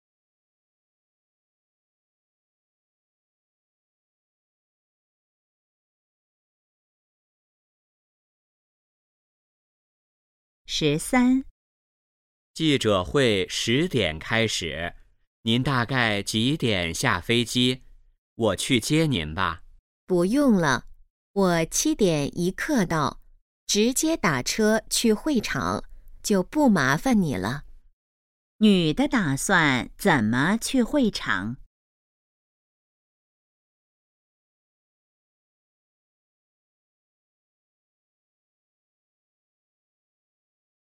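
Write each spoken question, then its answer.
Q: 女的打算怎么去会场?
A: 打车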